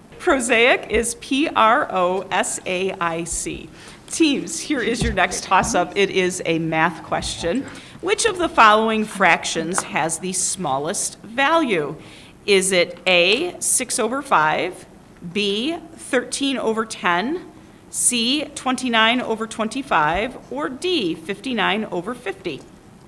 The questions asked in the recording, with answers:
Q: Which of the following fractions has the smallest value?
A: And to remind you, answer C was 29 over 25.